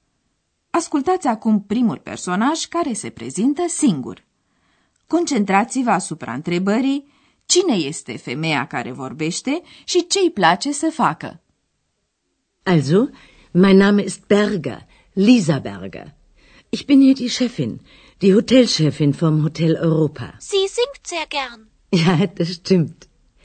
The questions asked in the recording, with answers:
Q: cine este femeia care vorbește și ce îi place să facă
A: Era așadar doamna Berger, șefa hotelului Europa din Aachen